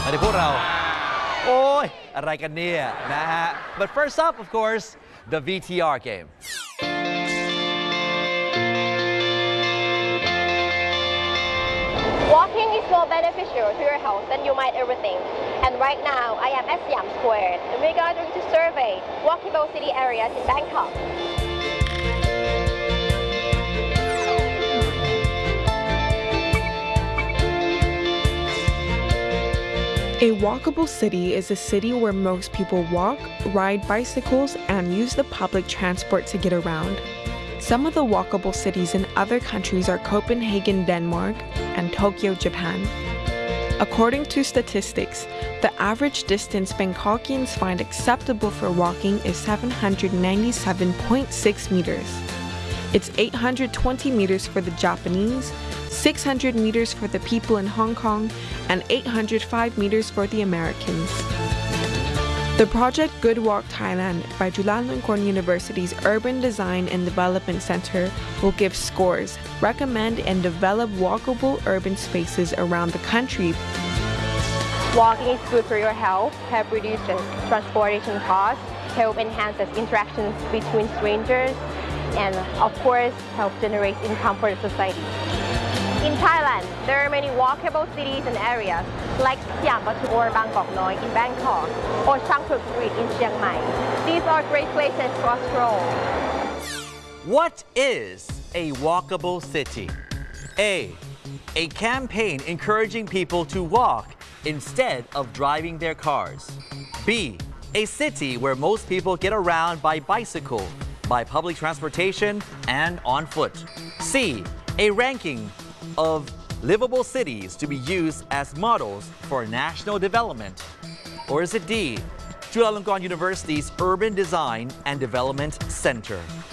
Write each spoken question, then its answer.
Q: What is a walkable city?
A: The answer is B. A city where most people get around by bicycle, by public transportation, and on foot.